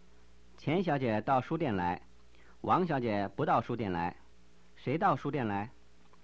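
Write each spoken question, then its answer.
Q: 谁到书店来?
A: 钱小姐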